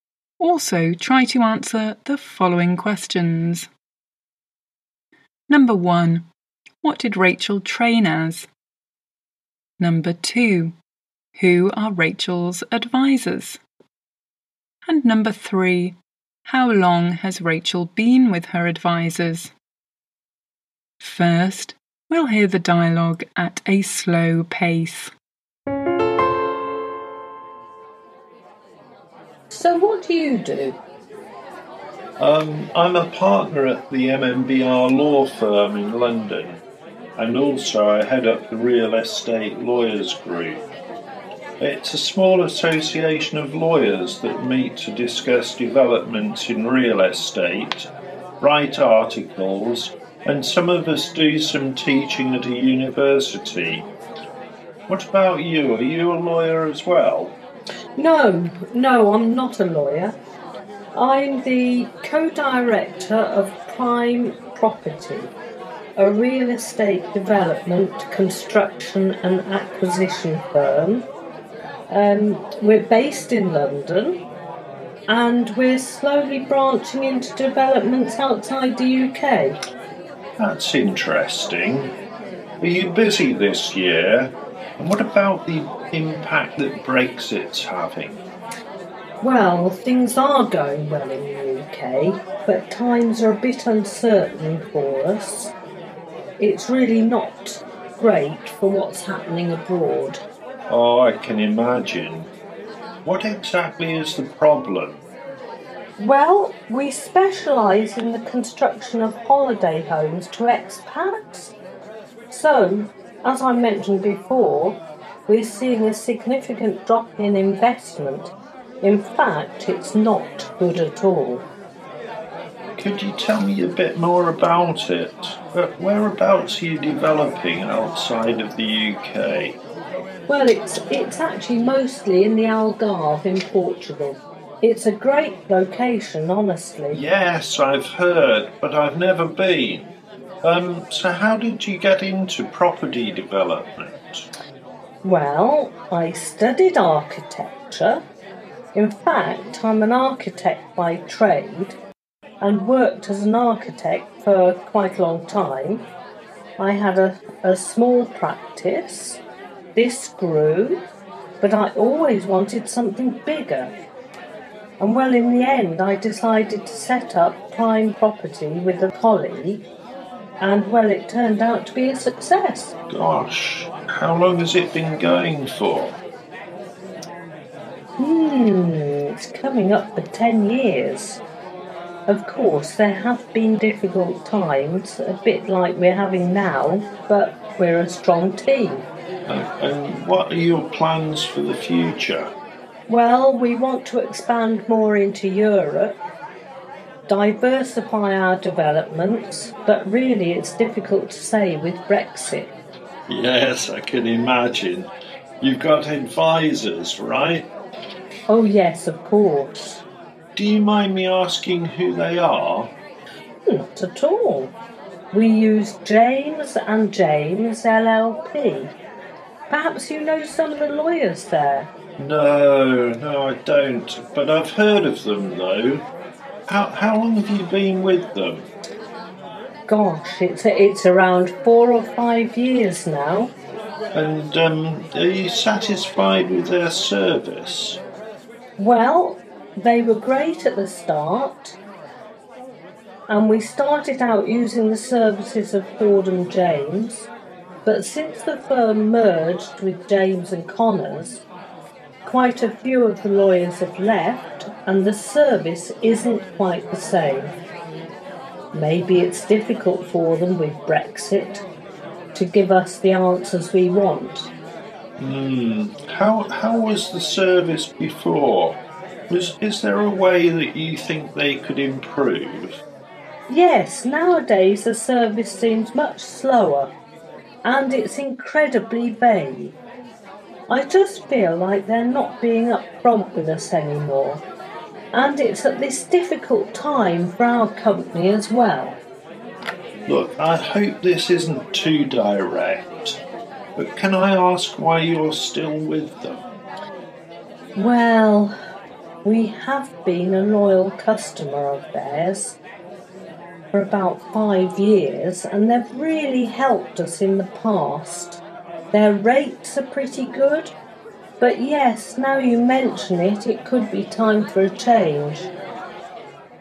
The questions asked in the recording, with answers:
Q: What did Rachel train as?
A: So Rachel trained as an architect.

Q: Who are Rachel's advisors?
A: The answer is James and James.

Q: How long has Rachel been with her advisors?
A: So it's been 4 or 5 years.